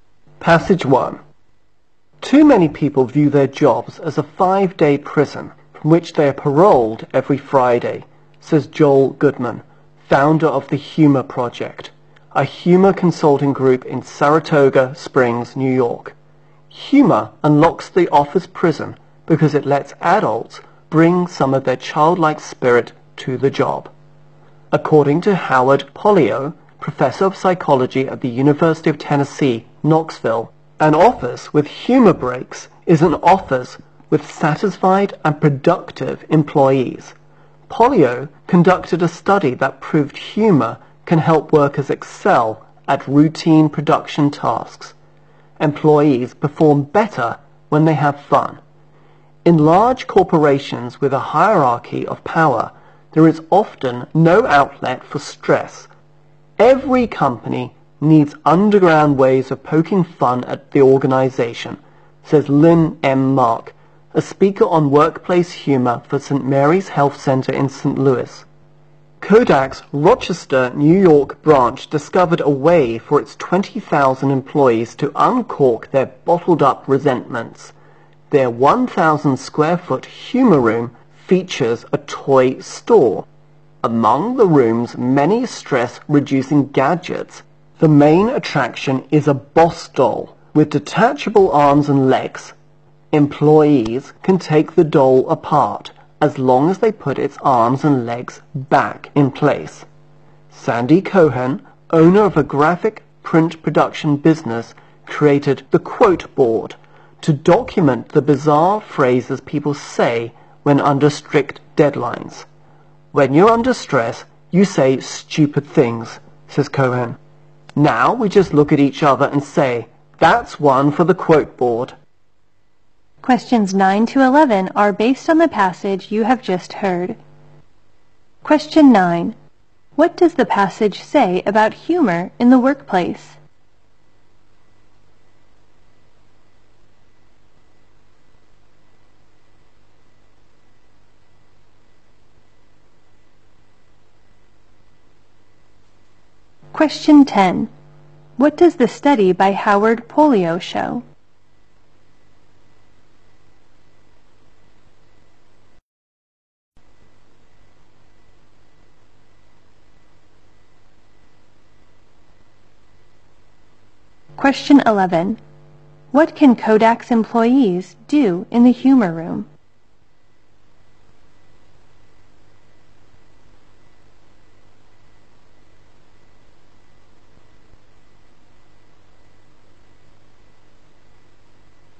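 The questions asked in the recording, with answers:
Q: What does the study by Howard Polio show?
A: Humor can help workers excel at routine production tasks

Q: What can Kodak's employees do in the humor room?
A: Take apart a boss doll (as long as they put it back together)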